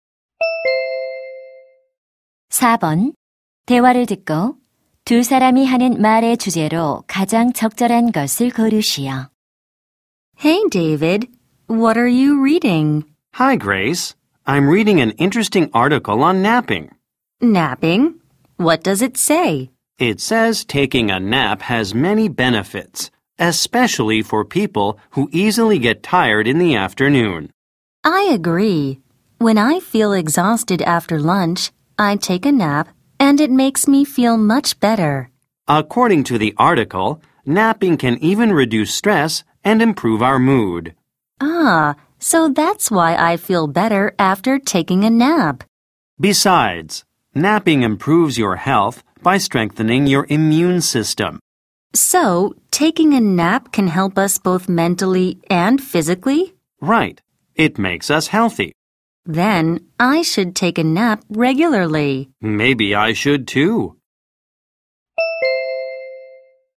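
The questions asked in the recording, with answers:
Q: 대화를 듣고 두 사람이 하는 말의 주제로 가장 적절한 것을 고르시오.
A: 낮잠의 이점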